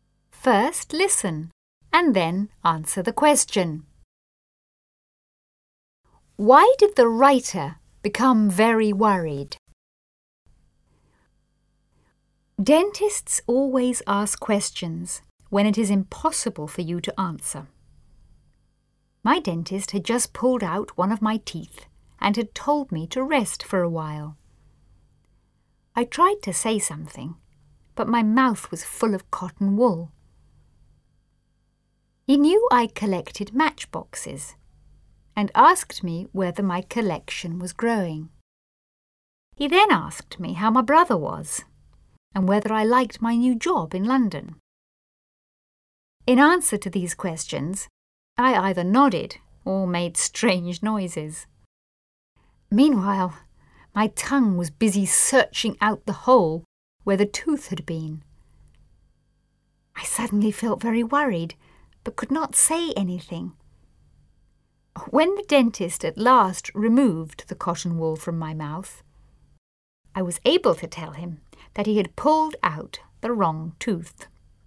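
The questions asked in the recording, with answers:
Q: Why did the writer become very worried?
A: Because the dentist had pulled out the wrong tooth.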